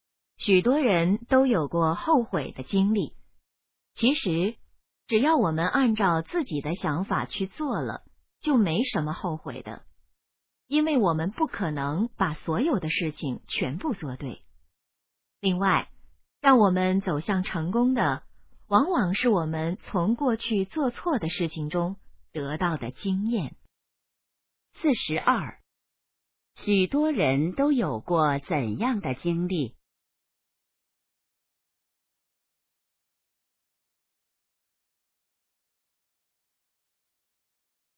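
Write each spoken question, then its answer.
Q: 许多人都有过怎样的经历?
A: 后悔的经历

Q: 什么能帮助我们走向成功?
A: 从过去做错的事情中得到的经验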